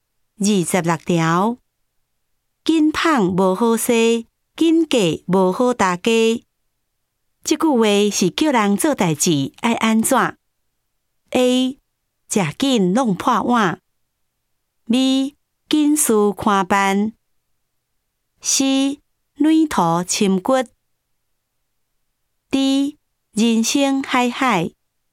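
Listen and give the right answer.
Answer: A: 吃紧弄破碗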